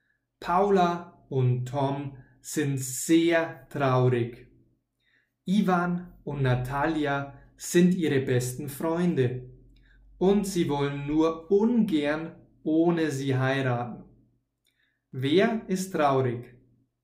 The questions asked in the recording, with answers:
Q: Wer ist traurig?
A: Paula und Tom.